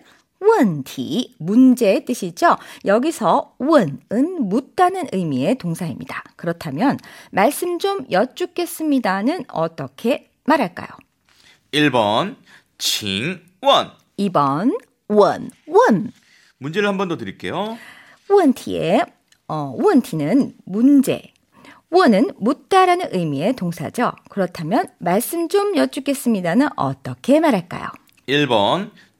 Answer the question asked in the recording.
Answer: 정답은 1번.